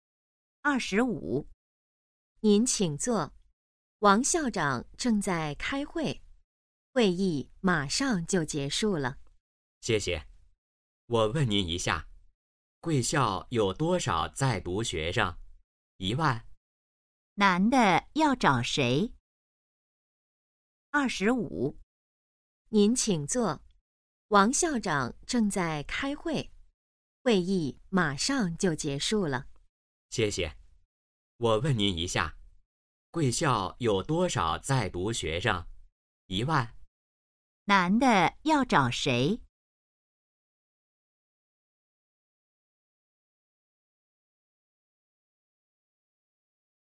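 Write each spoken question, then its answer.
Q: 男的要找谁?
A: 王校长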